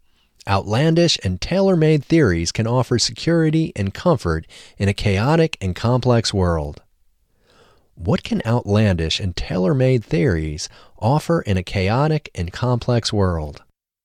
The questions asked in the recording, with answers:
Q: What can outlandish and tailor-made theories offer in a chaotic and complex world?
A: Outlandish and tailor-made theories can offer security and comfort in a chaotic and complex world.